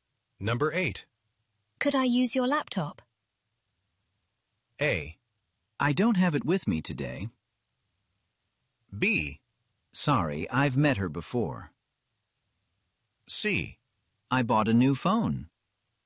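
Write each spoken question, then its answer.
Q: Could I use your laptop?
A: A: I don't have it with me today.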